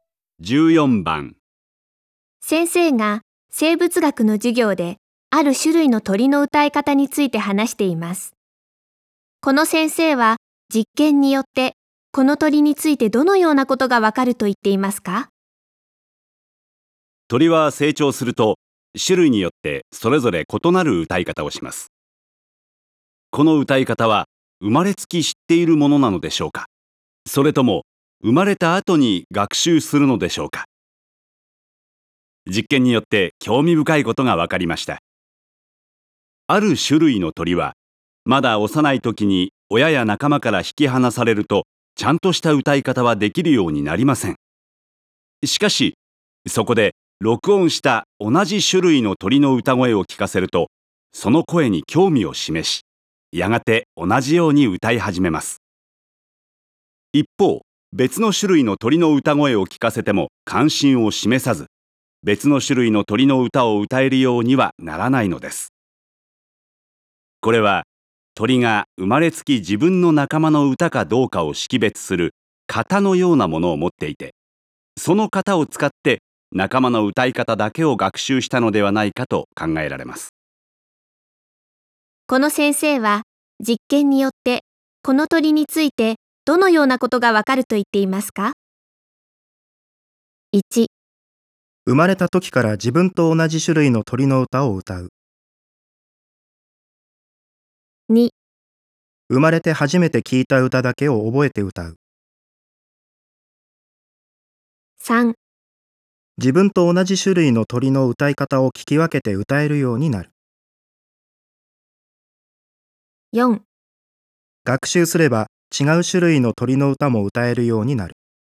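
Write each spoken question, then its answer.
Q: この先生は実験によってこの鳥についてどのようなことがわかると言っていますか?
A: 3: 自分と同じ種類の鳥の歌い方を聞き分けて歌えるようになる。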